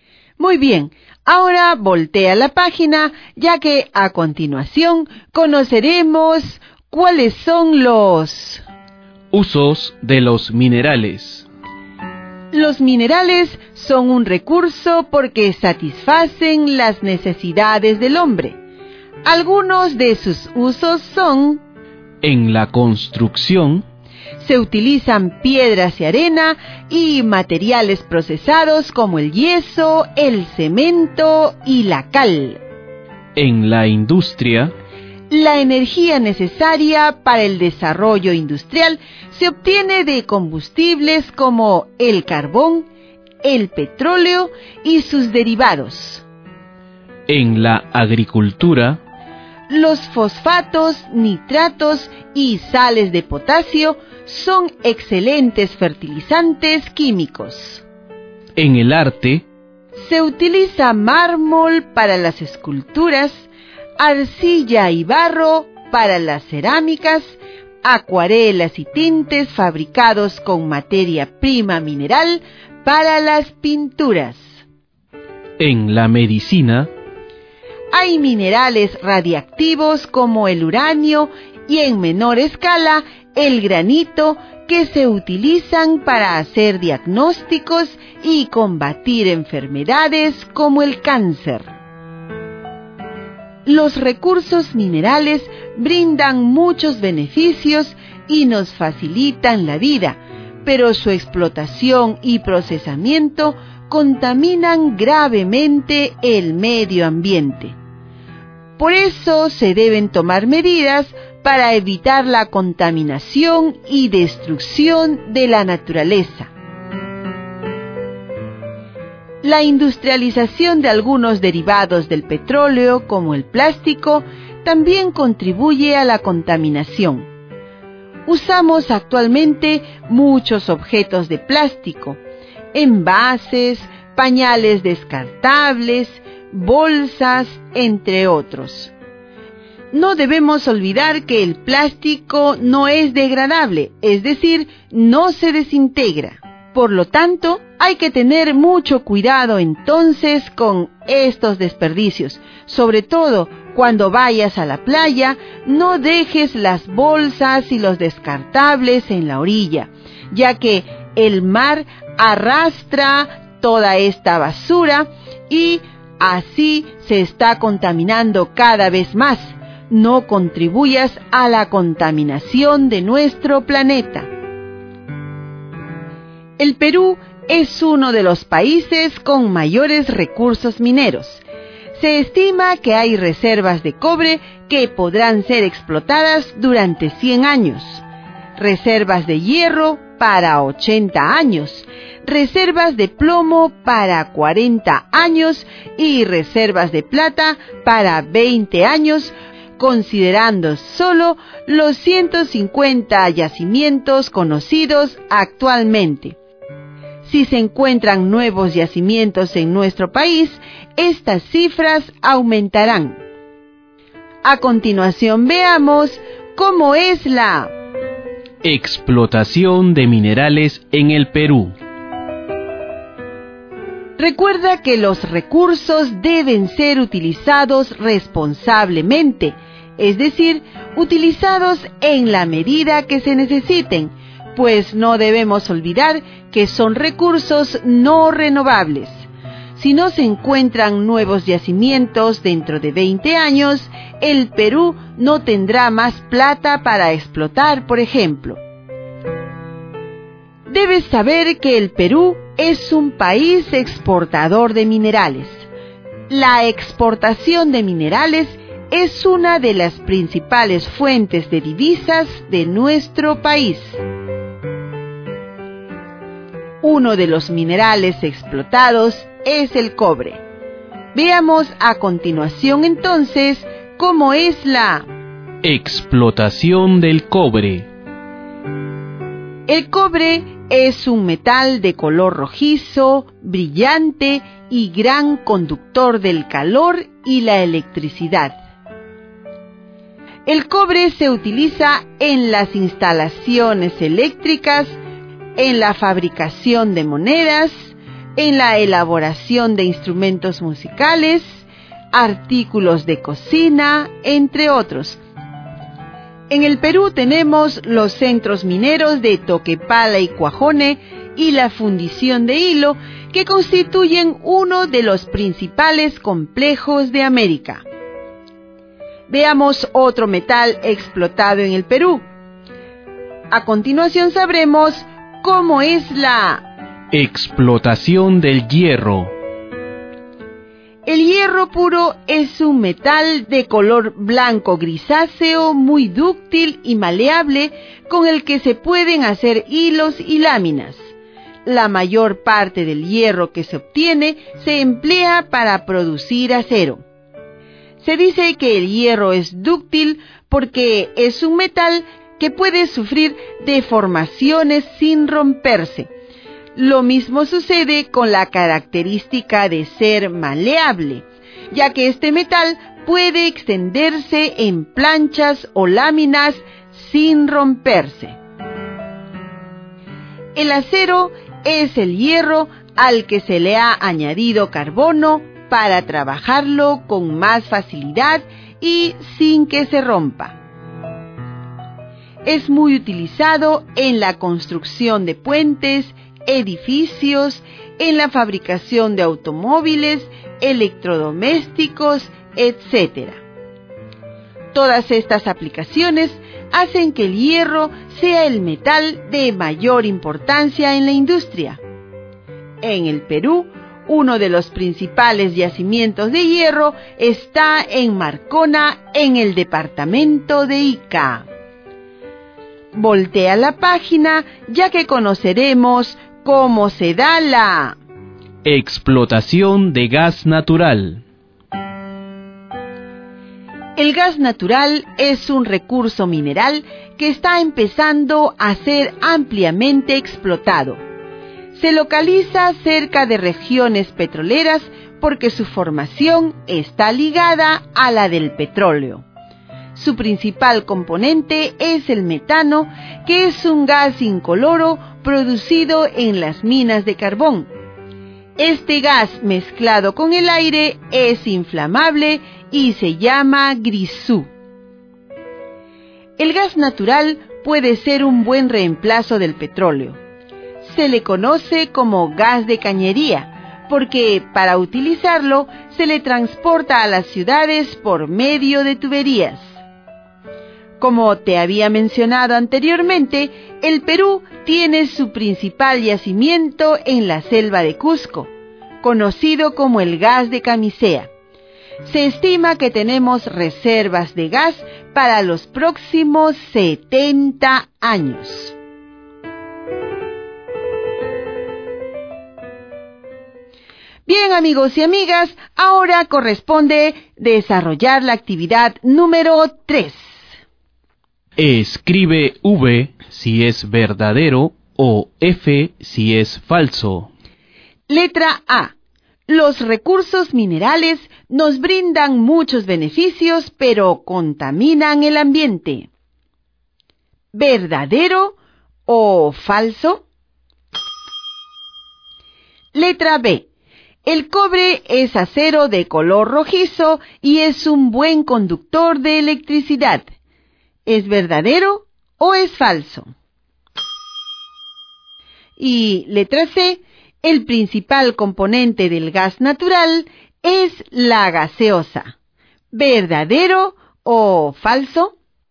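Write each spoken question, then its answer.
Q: Letra A. Los recursos minerales nos brindan muchos beneficios, pero contaminan el ambiente. ¿Verdadero o falso?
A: Verdadero

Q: Letra B. El cobre es acero de color rojizo y es un buen conductor de electricidad. ¿Es verdadero o es falso?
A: Falso

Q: Y letra C. El principal componente del gas natural es la gaseosa. ¿Verdadero o falso?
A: Falso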